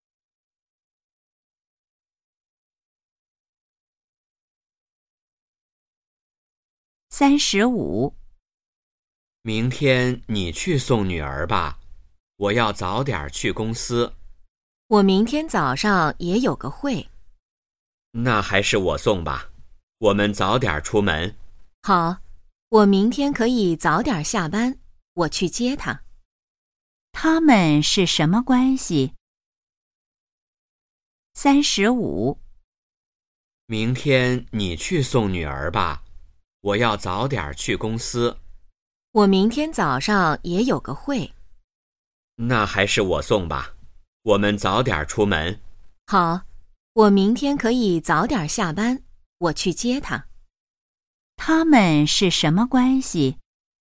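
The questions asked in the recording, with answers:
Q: 他们是什么关系?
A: 夫妻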